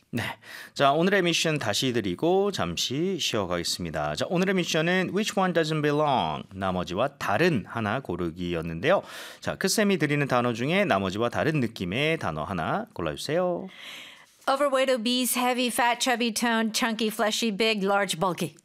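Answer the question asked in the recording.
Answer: toned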